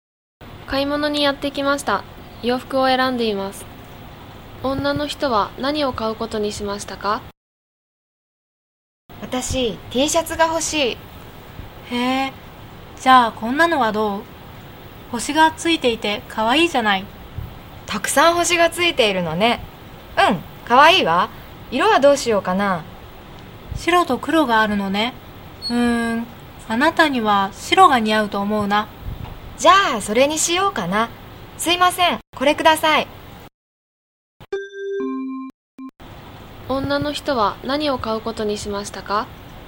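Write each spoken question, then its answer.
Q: 女の人は何を買うことにしましたか?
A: 星がたくさんついた白いTシャツ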